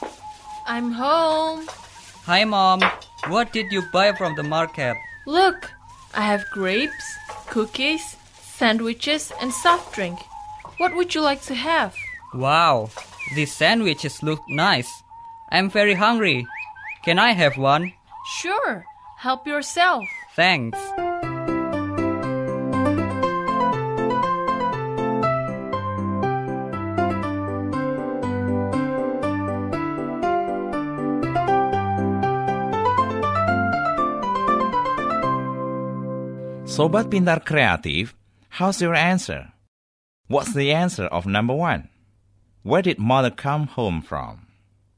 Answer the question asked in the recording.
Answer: The market, right. Juan's mother came from the market.